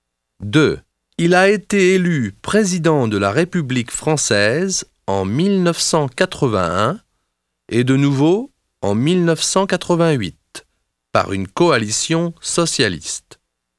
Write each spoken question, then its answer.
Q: Il a été élu président de la République française en 1981 et de nouveau en 1988 par une coalition socialiste.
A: C'est François Mitterrand. Il est du XXe siècle.